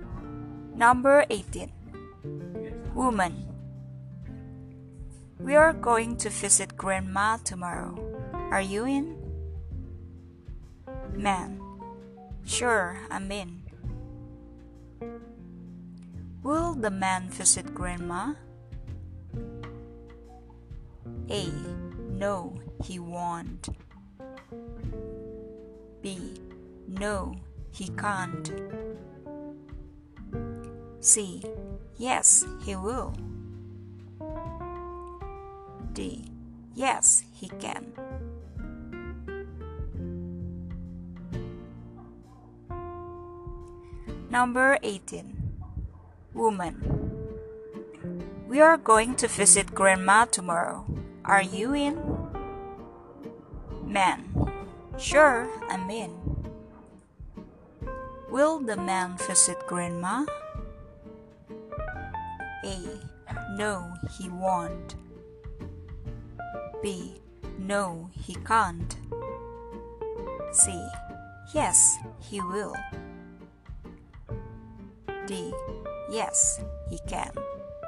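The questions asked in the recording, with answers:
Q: Will the man visit grandma?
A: C: Yes, he will.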